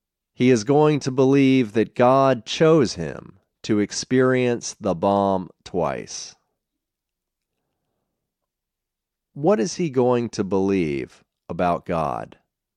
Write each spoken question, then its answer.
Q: What is he going to believe about God?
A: He is going to believe that God chose him to experience the bomb twice.